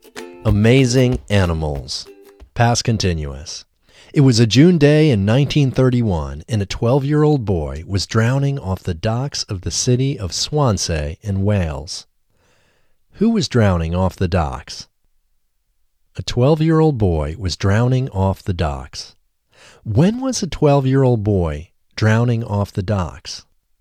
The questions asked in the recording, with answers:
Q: Who was drowning off the docks?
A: A 12-year-old boy was drowning off the docks.

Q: When was a 12-year-old boy drowning off the docks?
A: A 12-year-old boy was drowning off the docks on a June day in 1931.